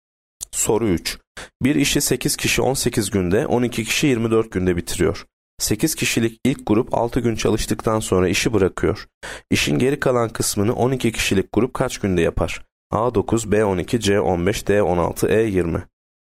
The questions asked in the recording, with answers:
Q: İşin geri kalan kısmını 12 kişilik grup kaç günde yapar?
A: Yanıt D 16.